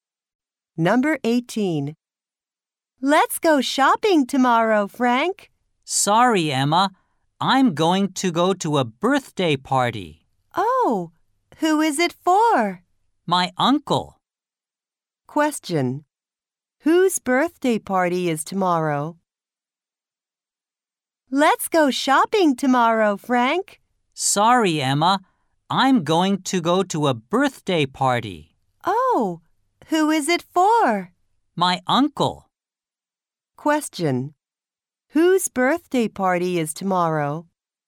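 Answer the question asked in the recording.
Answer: Frank's uncle's.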